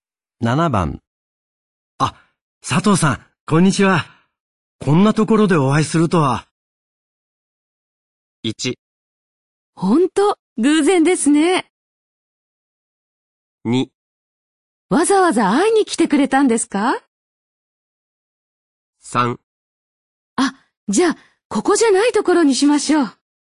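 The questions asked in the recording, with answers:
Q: あ、佐藤さん、こんにちは。こんなところでお会いするとは。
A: 1: 本当、偶然ですね。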